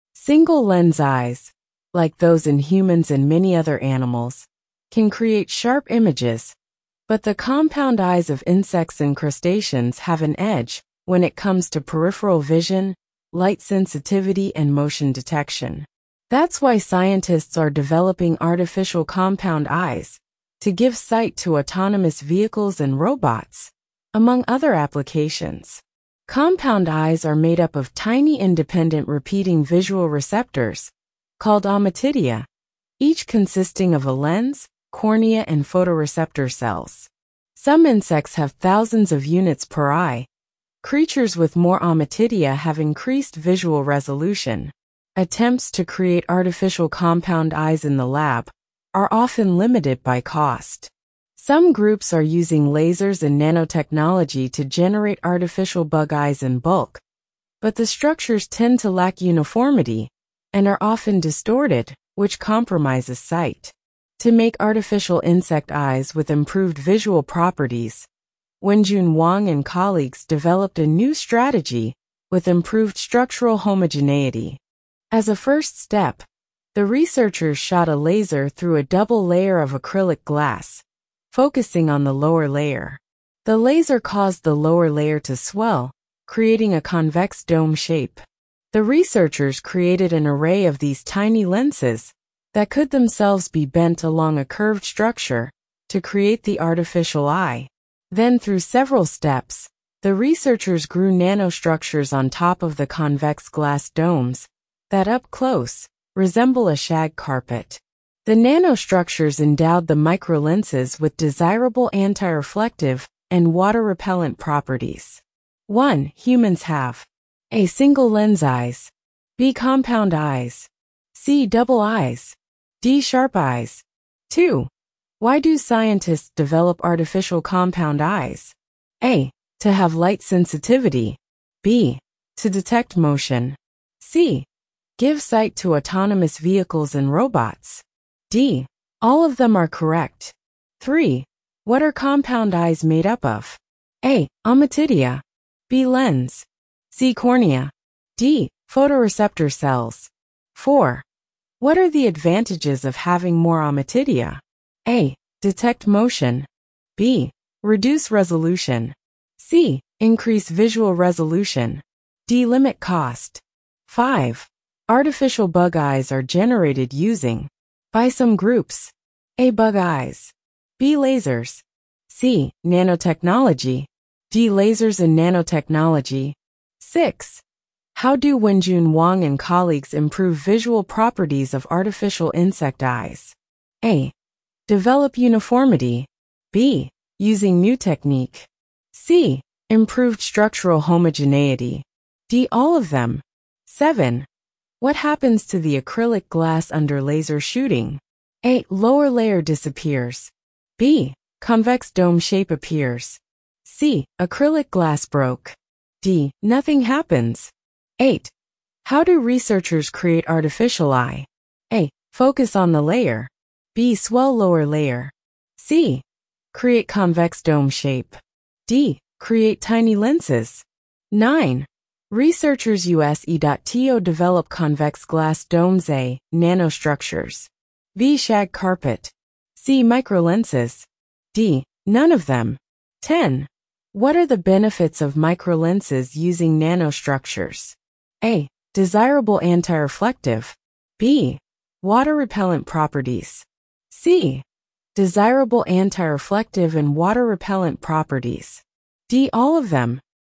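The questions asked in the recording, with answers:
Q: Humans have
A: A: Single-lens eyes.

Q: What are compound eyes made up of?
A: A: Ommatidia.

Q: What are the advantages of having more ommatidia?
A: C: Increase visual resolution.

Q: Artificial bug eyes are generated using By some groups,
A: D: Lasers and nanotechnology.

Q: What happens to the acrylic glass under laser shooting?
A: B: Convex dome shape appears.

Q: What are the benefits of microlenses using nanostructures?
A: C: Desirable anti-reflective and water-repellent properties.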